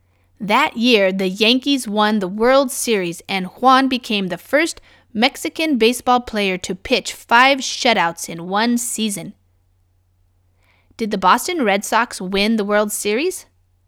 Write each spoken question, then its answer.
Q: Did the Boston Red Sox win the World Series?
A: No, not the Boston Red Sox.